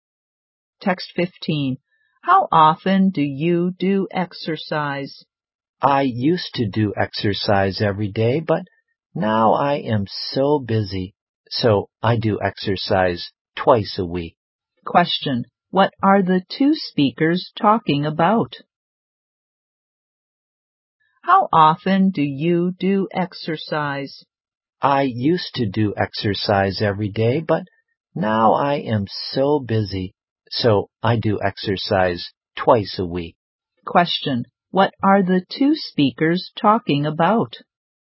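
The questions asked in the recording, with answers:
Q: What are the two speakers talking about?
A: Doing exercise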